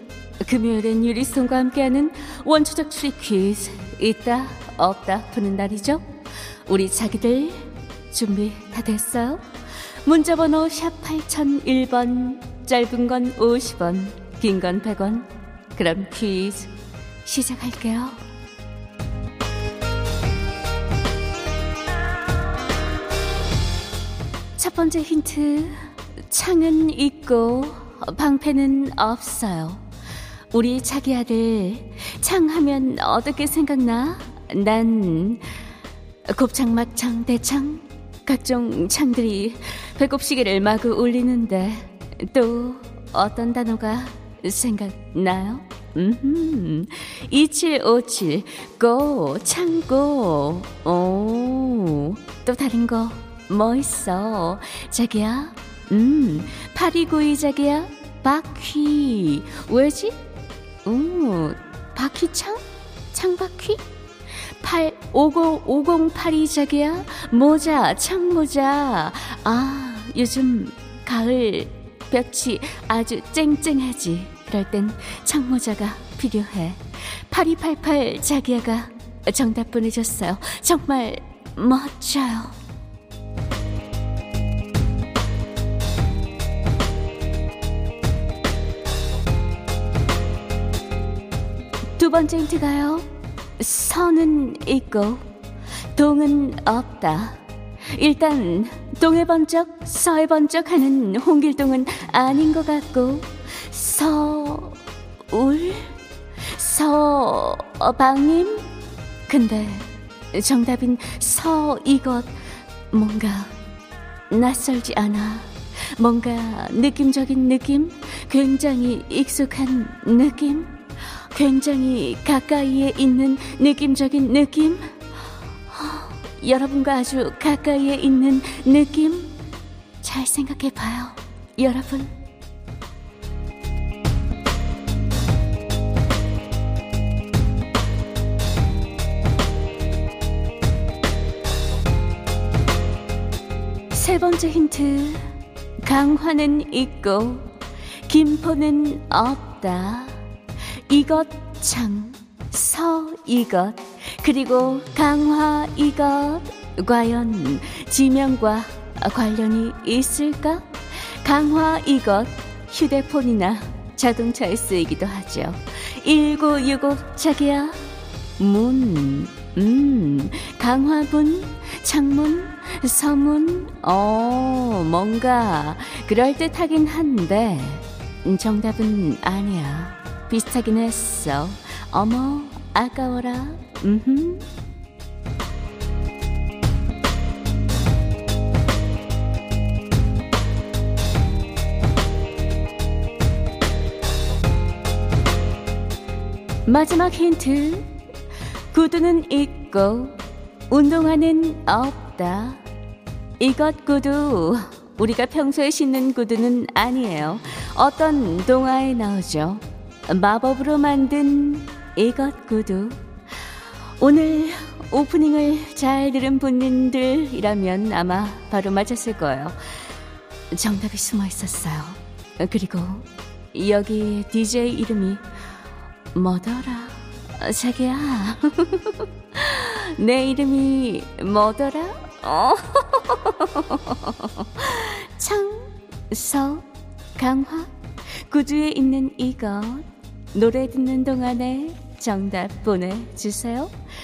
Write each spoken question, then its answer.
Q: 창서 강화 구두에 있는 이것 노래 듣는 동안에 정답 보내주세요.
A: 정답, 유리.